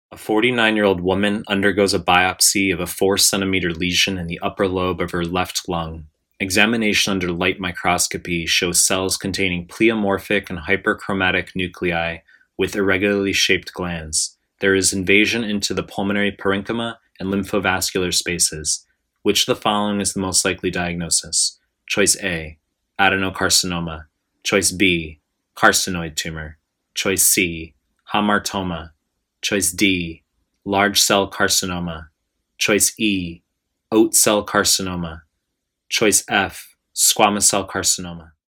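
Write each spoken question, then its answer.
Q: Which of the following is the most likely diagnosis?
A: A: adenocarcinoma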